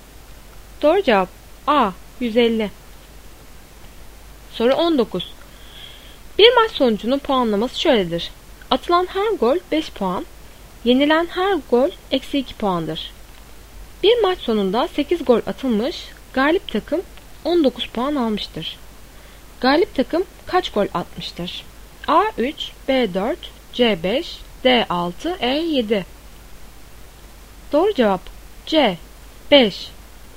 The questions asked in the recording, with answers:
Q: Galip takım kaç gol atmıştır?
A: Doğru cevap C5.